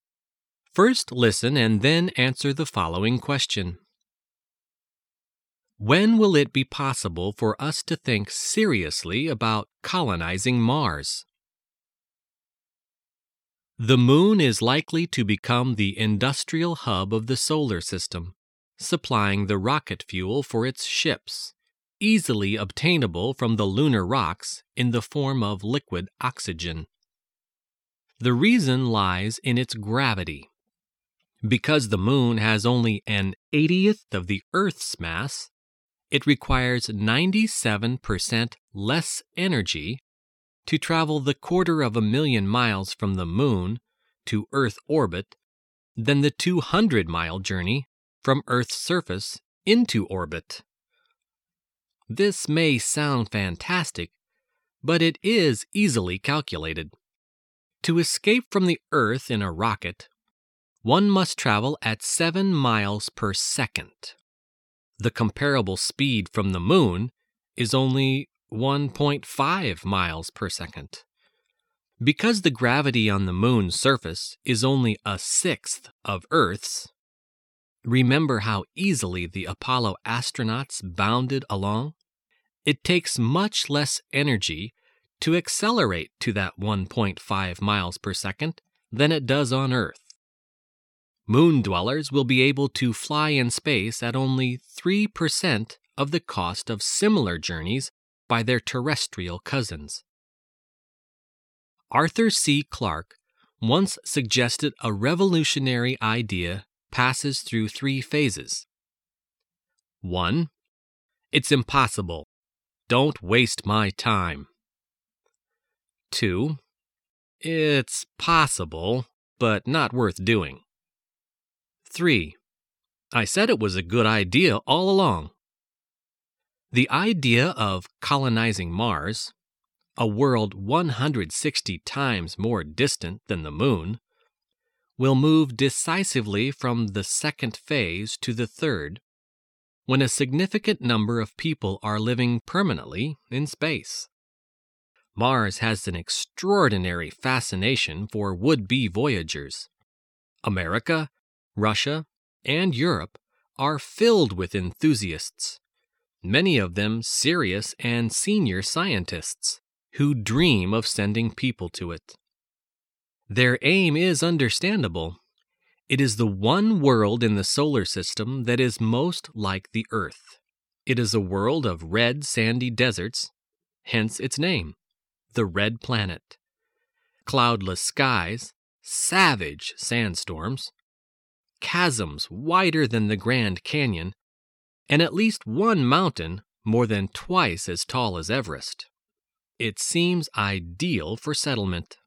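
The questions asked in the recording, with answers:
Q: When will it be possible for us to think seriously about colonizing Mars?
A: When a significant number of people are living permanently in space.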